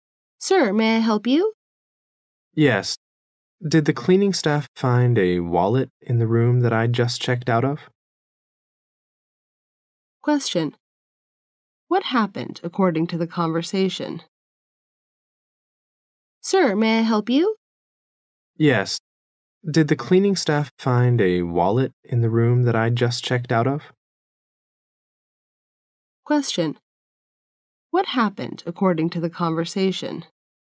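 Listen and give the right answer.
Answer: The man lost his wallet in a hotel room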